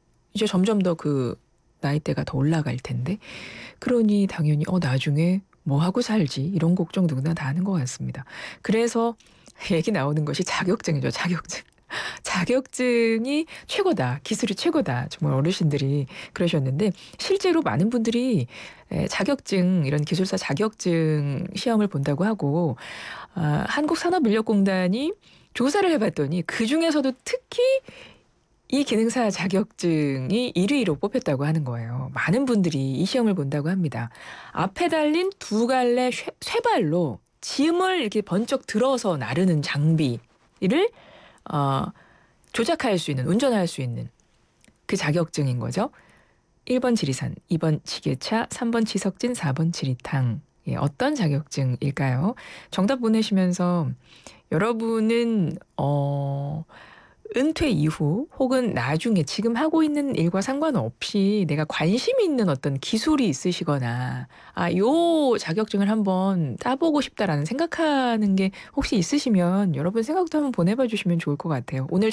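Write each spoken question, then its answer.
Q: 예, 어떤 자격증일까요?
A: 2번: 지게차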